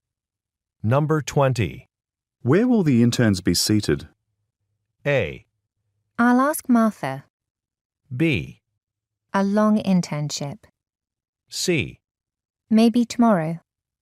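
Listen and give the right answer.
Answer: A: I'll ask Martha.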